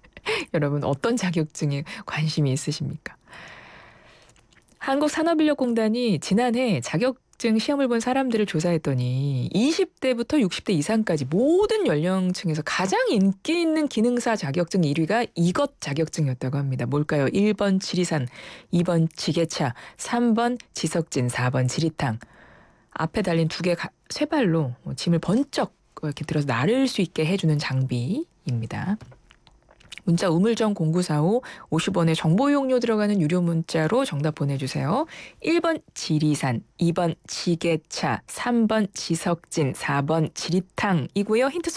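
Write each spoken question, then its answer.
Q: 뭘까요? 1번 지리산, 2번 지게차, 3번 지석진, 4번 지리탕.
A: 2: 지게차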